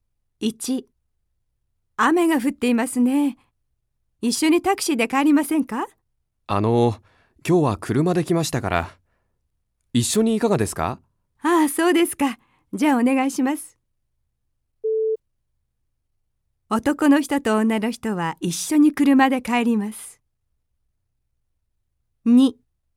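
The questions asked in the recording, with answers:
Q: 男の人と女の人は一緒に車で帰ります。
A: ○(正しい)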